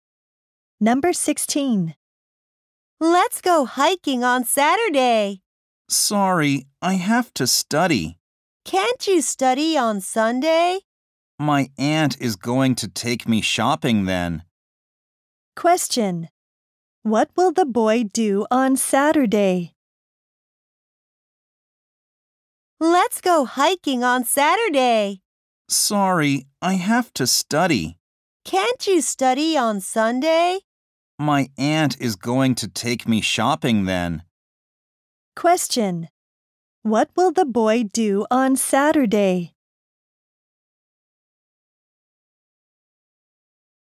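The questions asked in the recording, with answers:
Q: What will the boy do on Saturday?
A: Study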